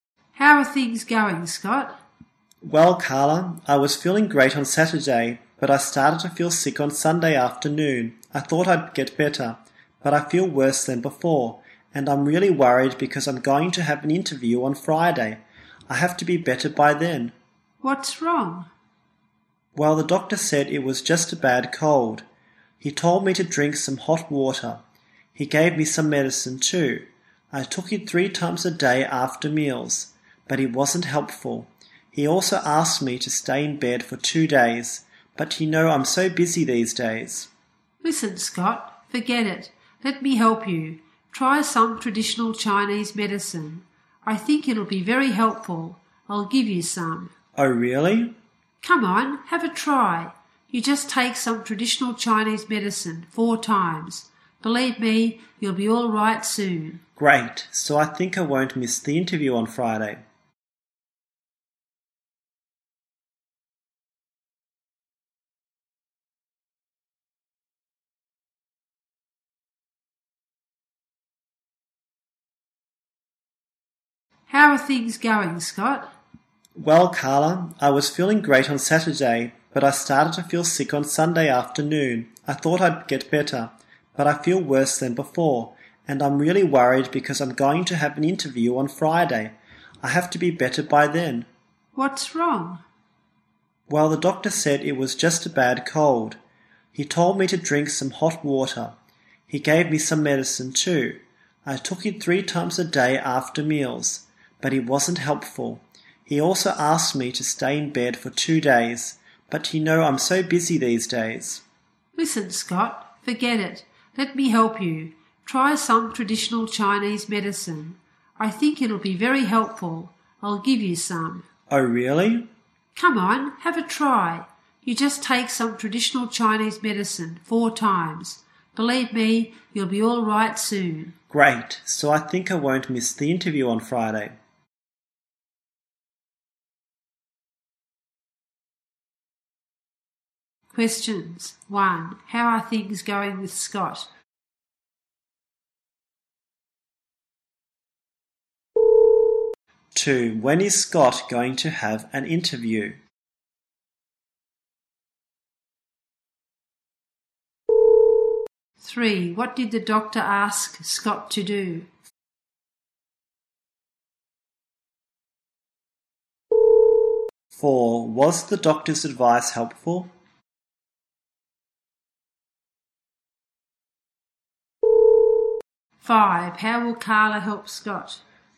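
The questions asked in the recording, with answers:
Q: How are things going with Scott?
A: Not well; he is sick with a bad cold

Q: when is Scott going to have an interview?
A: On Friday

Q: what did the doctor ask Scott to do?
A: Drink hot water, take medicine and stay in bed for 2 days

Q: was the doctor's advice helpful?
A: No

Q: how will Carla help Scott?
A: By giving him some traditional Chinese medicine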